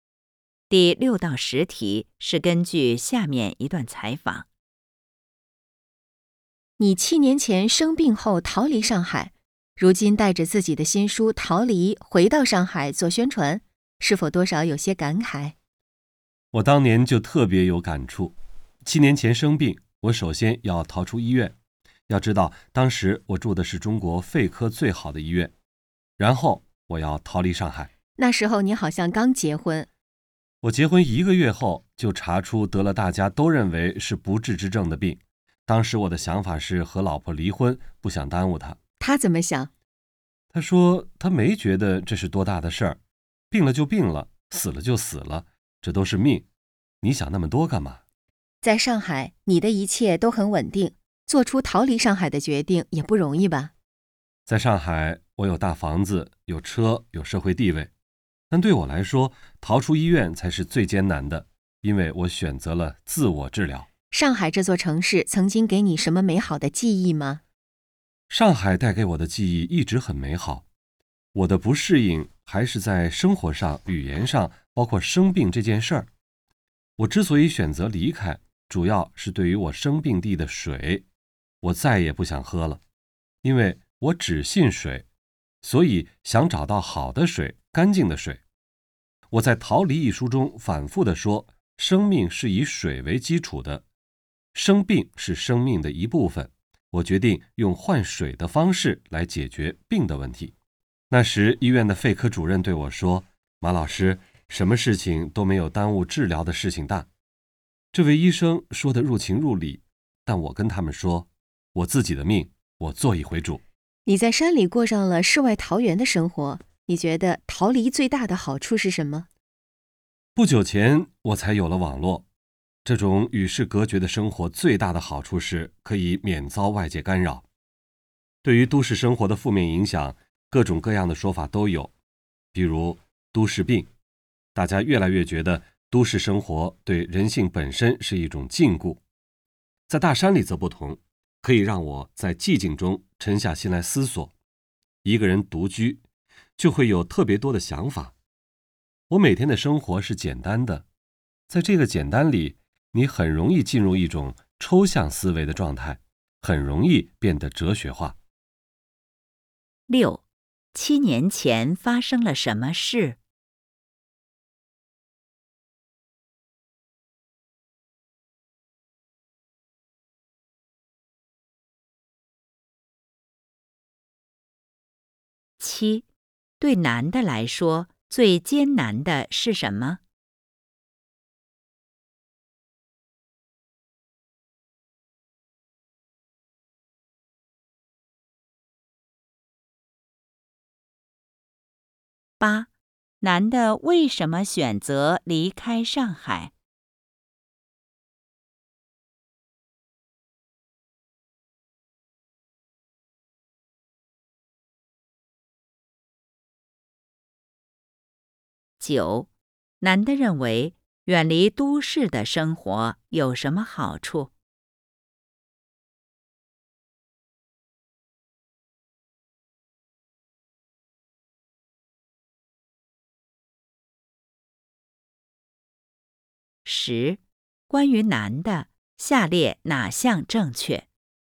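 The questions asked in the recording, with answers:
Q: 七年前发生了什么事?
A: 他结婚一个月后生病了(得了被认为是不治之症的病)

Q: 对男的来说,最艰难的是什么?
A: 逃出医院

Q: 男的为什么选择离开上海?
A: 不想再喝生病地的水,想找到好的、干净的水

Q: 男的认为远离都市的生活有什么好处?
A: 可以免遭外界干扰,在寂静中沉下心来思索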